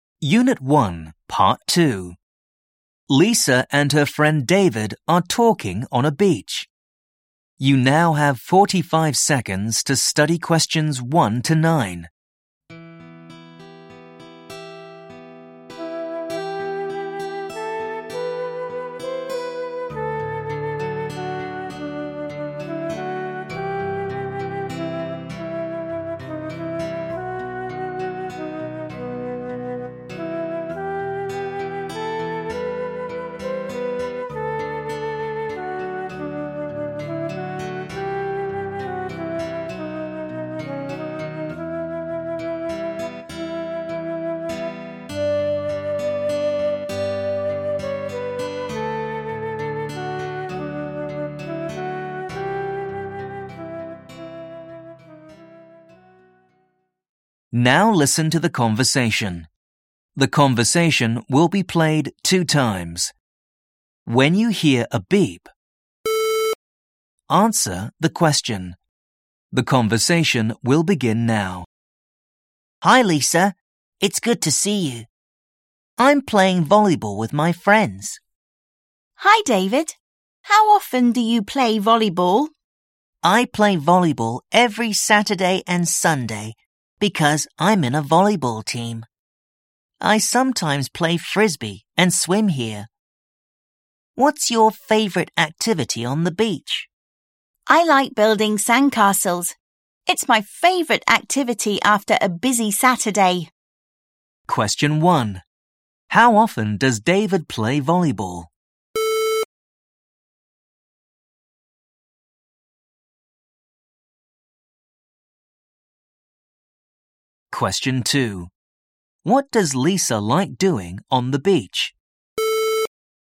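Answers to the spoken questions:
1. Every Saturday and Sunday
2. Building sandcastles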